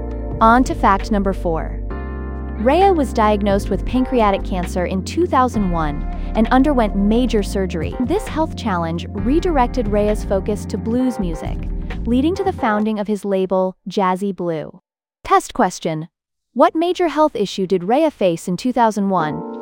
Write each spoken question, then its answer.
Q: what major health issue did Rea face in 2001?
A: pancreatic cancer.